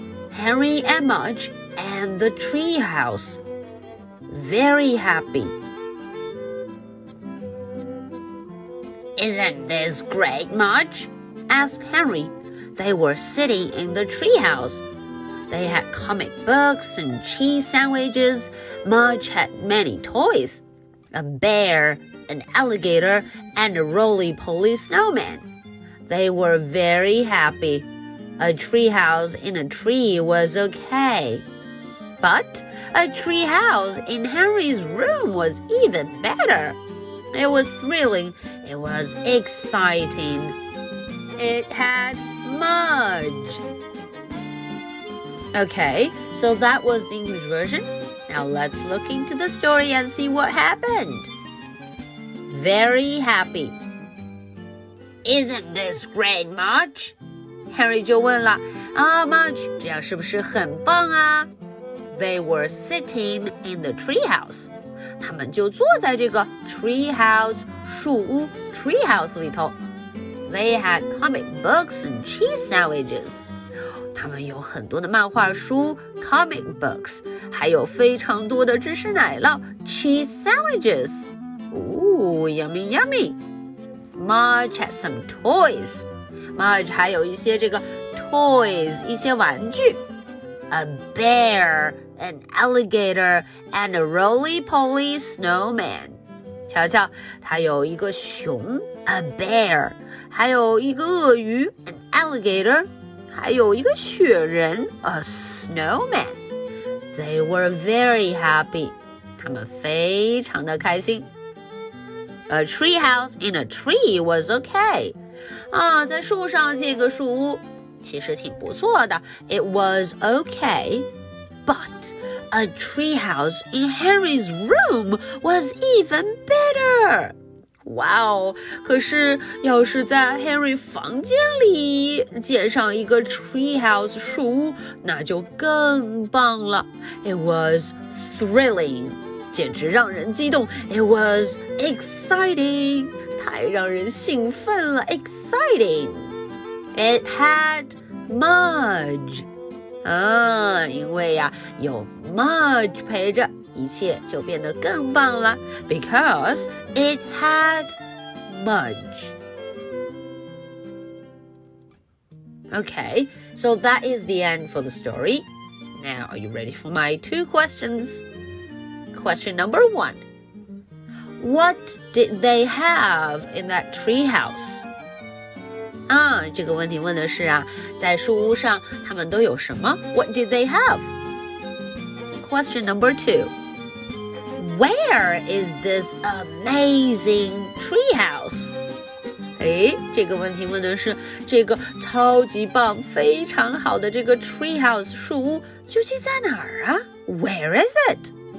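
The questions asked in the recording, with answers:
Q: What did they have in that treehouse?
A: Comic books and cheese sandwiches

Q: Where is this amazing treehouse?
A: In Henry's room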